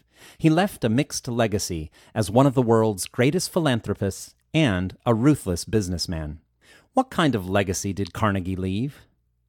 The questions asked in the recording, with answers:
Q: What kind of legacy did Carnegie leave?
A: Carnegie left a mixed legacy as one of the world's greatest philanthropists and a ruthless businessman.